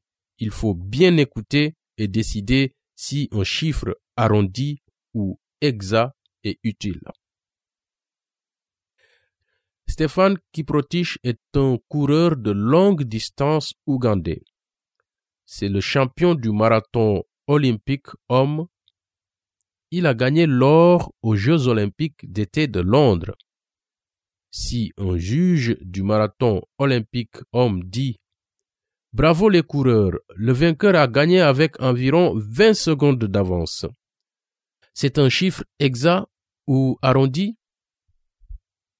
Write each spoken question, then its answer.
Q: C'est un chiffre exact ou arrondi?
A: Je pense qu'il est arrondi.